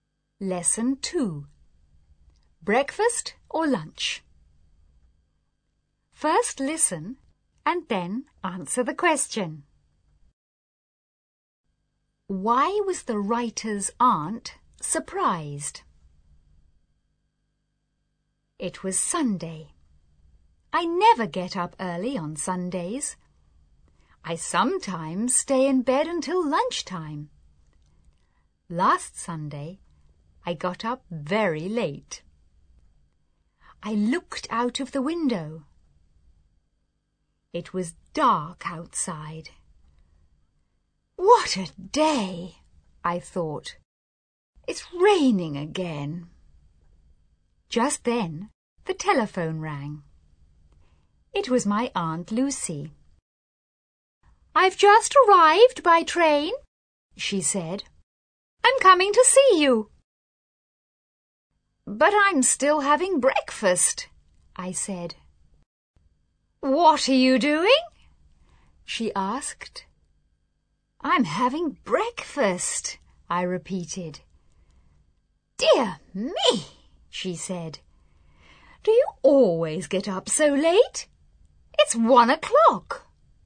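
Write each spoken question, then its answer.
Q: Why was the writer's aunt surprised?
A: Because the writer was still having breakfast at 1 o'clock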